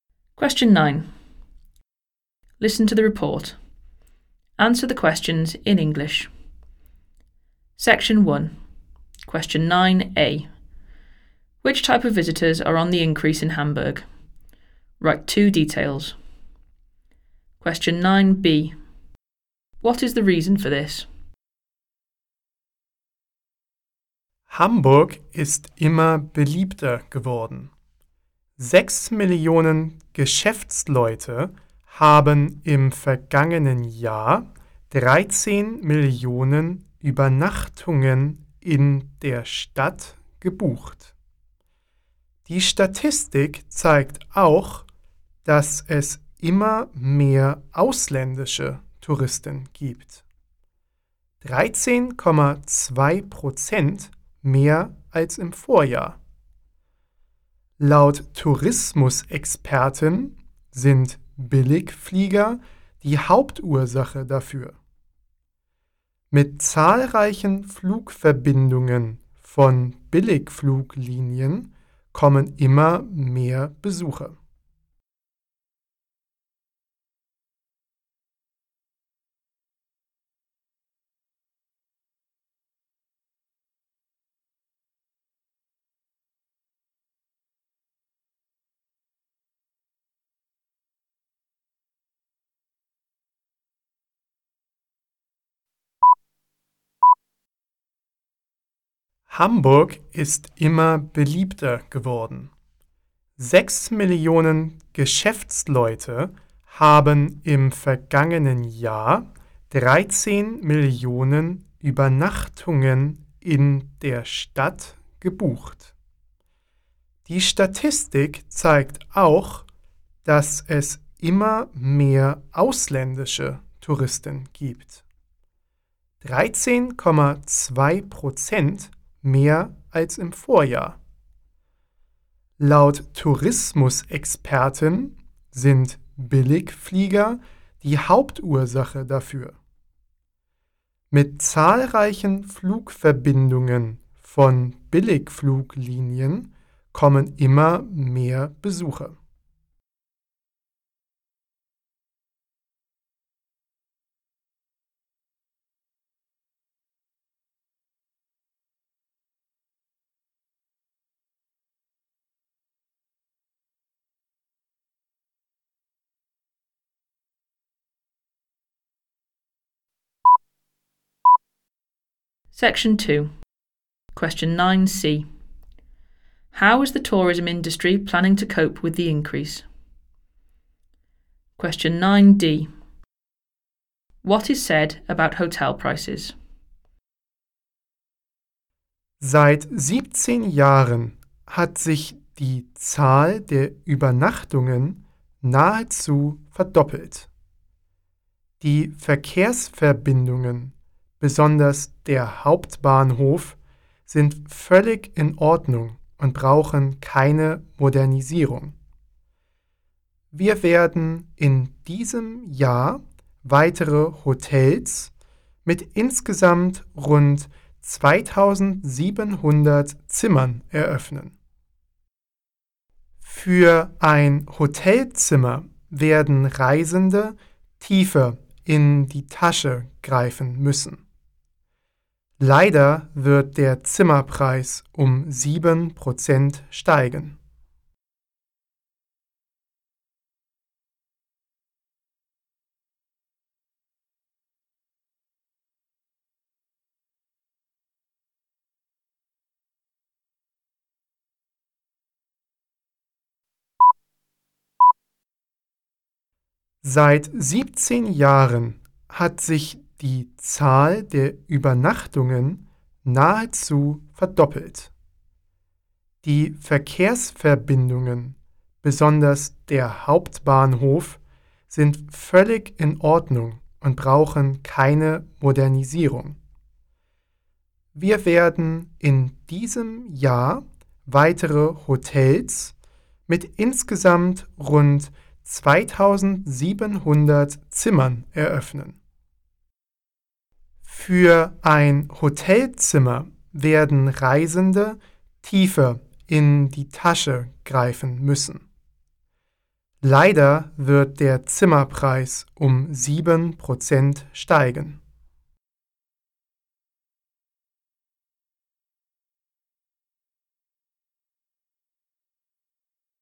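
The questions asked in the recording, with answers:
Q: Which type of visitors are on the increase in Hamburg?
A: Business people and foreign tourists

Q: What is the reason for this?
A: Budget airlines / cheap flights

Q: How is the tourism industry planning to cope with the increase?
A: Opening more hotels with around 2700 rooms this year

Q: What is said about hotel prices?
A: They will rise by 7%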